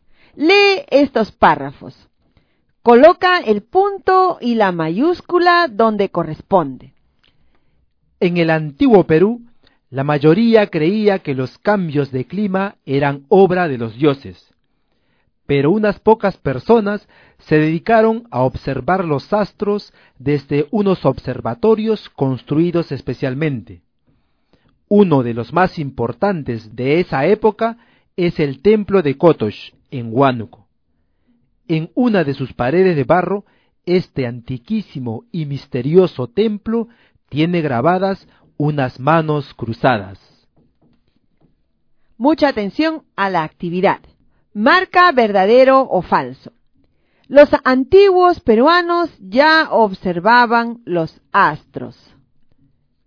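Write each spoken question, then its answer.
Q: Marca verdadero o falso. Los antiguos peruanos ya observaban los astros.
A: Verdadero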